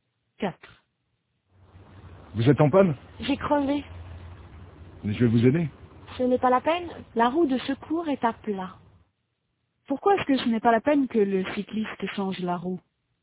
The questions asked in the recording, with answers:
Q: Pourquoi est-ce que ce n'est pas la peine que le cycliste change la roue?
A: Parce que la roue de secours est à plat.